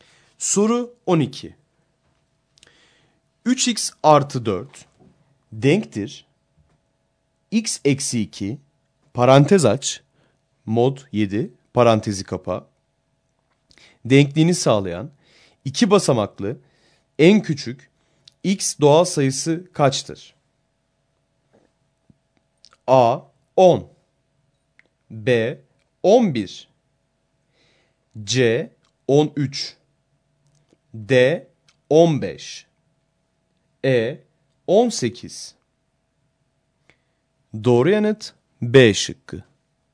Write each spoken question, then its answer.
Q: 3x artı 4 denktir x eksi 2 parantez aç mod 7 parantezi kapa denkliğini sağlayan iki basamaklı en küçük x doğal sayısı kaçtır?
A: Doğru yanıt B şıkkı.